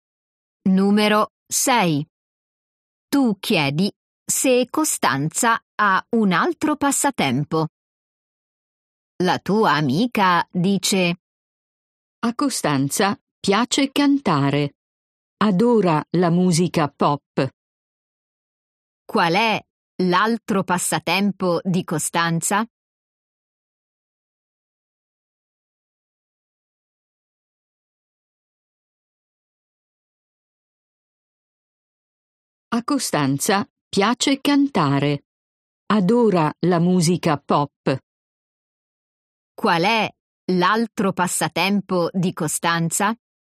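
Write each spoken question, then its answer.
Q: Qual è l'altro passatempo di Costanza?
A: Cantare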